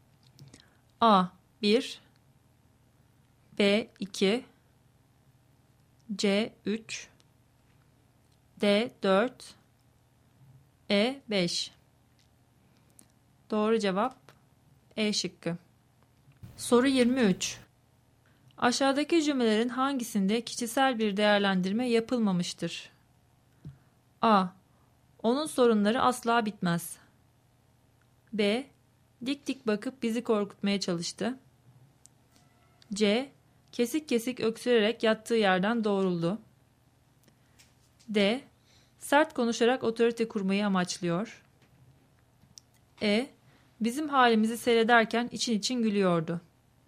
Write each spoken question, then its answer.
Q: Aşağıdaki cümlelerin hangisinde kişisel bir değerlendirme yapılmamıştır?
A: Doğru cevap C şıkkı.